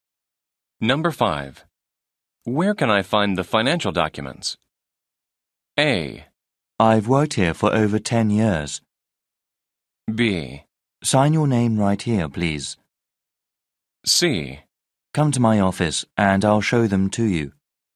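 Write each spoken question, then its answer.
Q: Where can I find the financial documents?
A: C: Come to my office and I'll show them to you.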